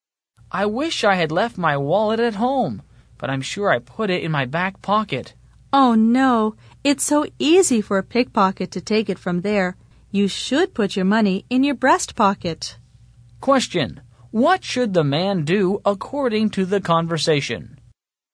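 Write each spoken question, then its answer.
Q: what should the man do according to the conversation?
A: Put his money in his breast pocket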